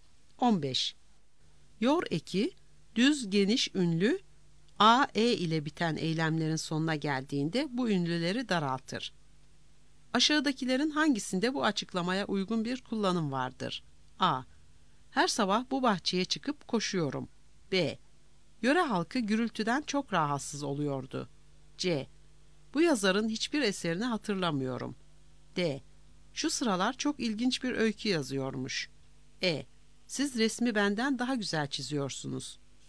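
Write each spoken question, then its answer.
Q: Aşağıdakilerin hangisinde bu açıklamaya uygun bir kullanım vardır?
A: C: Bu yazarın hiçbir eserini hatırlamıyorum.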